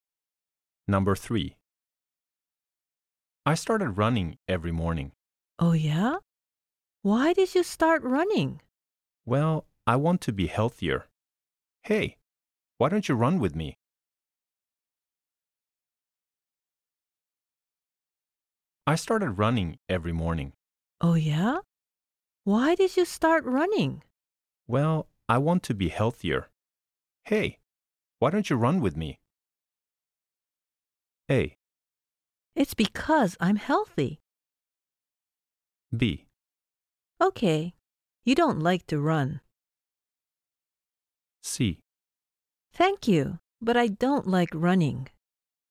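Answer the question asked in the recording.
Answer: C: Thank you, but I don't like running.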